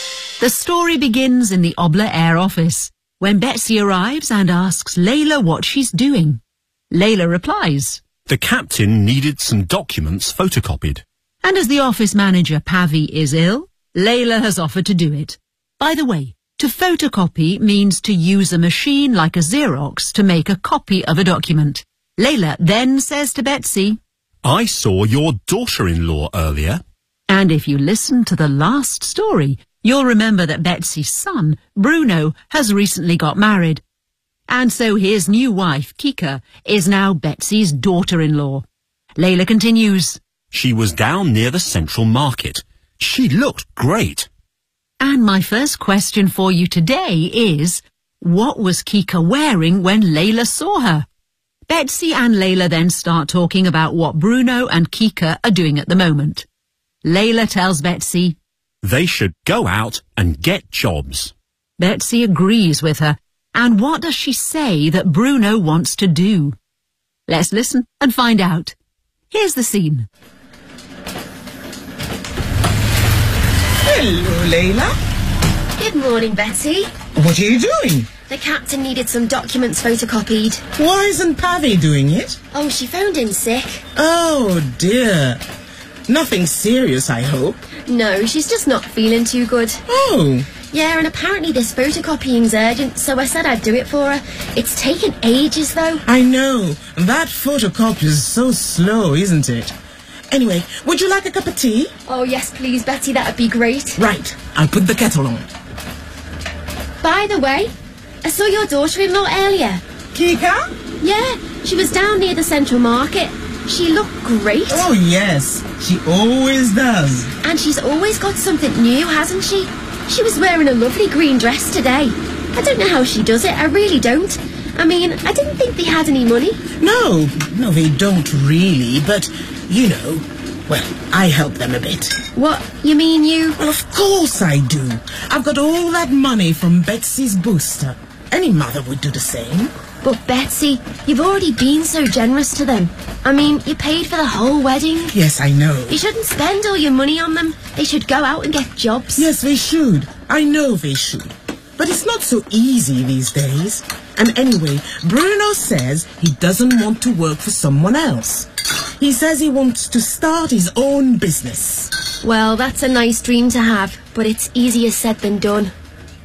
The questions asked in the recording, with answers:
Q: what was Kika wearing when Layla saw her?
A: She was wearing a lovely green dress today.